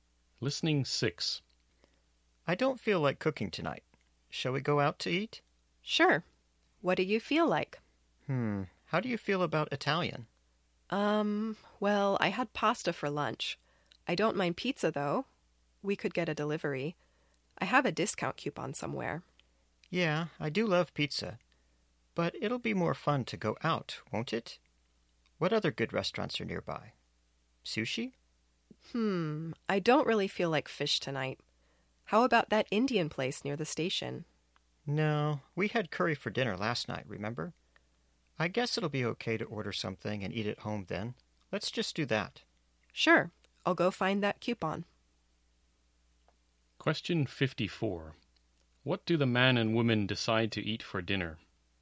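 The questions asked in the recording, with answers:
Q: What do the man and woman decide to eat for dinner?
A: Pizza delivered and eaten at home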